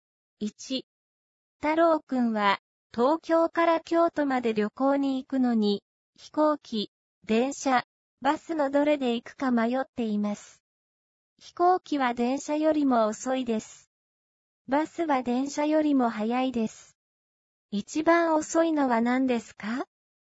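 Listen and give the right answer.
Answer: 飛行機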